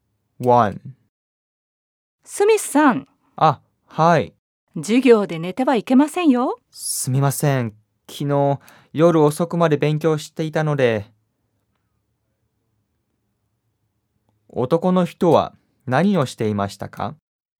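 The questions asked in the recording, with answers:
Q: 男の人は何をしていましたか?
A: 昨日夜遅くまで勉強していました。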